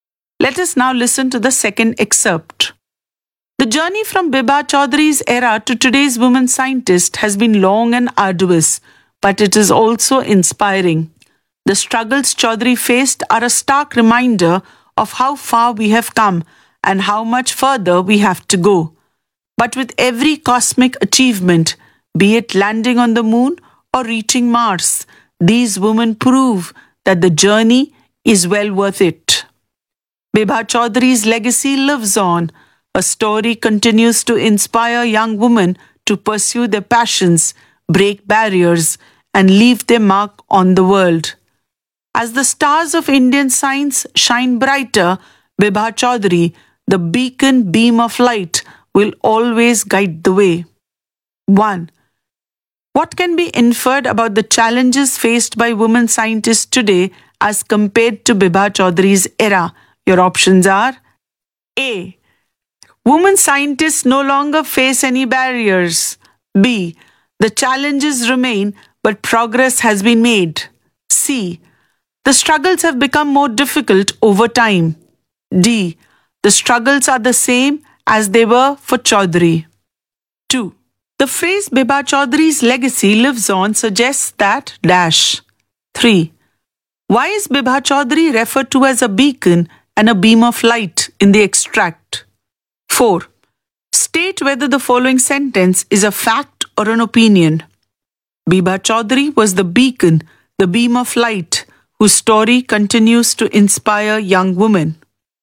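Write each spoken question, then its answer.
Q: What can be inferred about the challenges faced by women scientists today as compared to Bibha Chaudhary's era?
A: B: The challenges remain, but progress has been made.

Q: The phrase Bibha Chaudhary's legacy lives on suggests that dash.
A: her influence continues to inspire young women today

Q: Why is Bibha Chaudhary referred to as a beacon and a beam of light in the extract?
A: because her story continues to inspire and guide young women in science

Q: State whether the following sentence is a fact or an opinion.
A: Opinion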